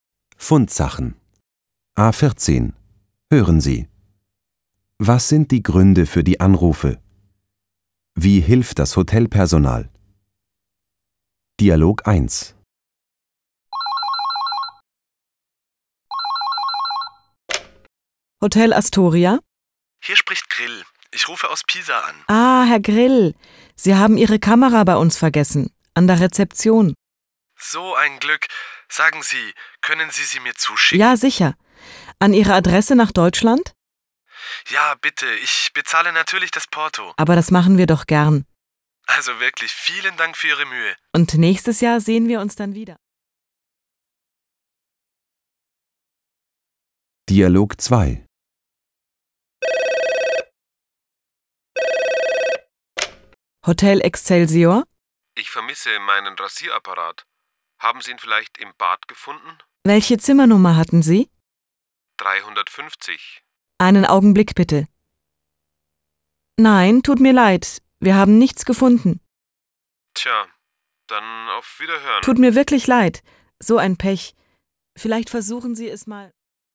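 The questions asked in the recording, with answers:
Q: Was sind die Gründe für die Anrufe?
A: Dialog 1: Herr Grill hat seine Kamera vergessen; Dialog 2: Ein Gast vermisst seinen Rasierapparat

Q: Wie hilft das Hotelpersonal?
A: Dialog 1: Das Hotel schickt die Kamera kostenlos nach Deutschland; Dialog 2: Das Hotel sucht, findet aber nichts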